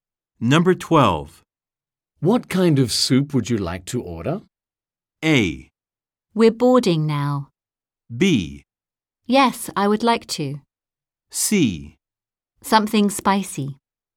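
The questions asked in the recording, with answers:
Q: What kind of soup would you like to order?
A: C: Something spicy.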